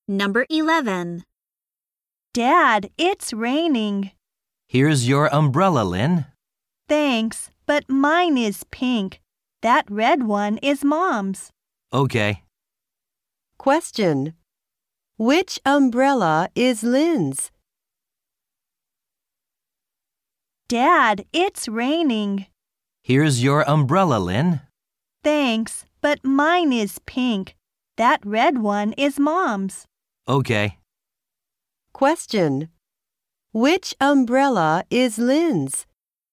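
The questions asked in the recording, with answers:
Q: Which umbrella is Lynn's?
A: The pink one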